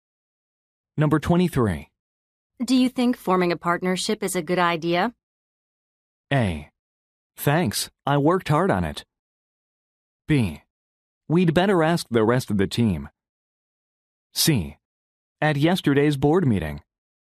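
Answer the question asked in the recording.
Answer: B: We'd better ask the rest of the team.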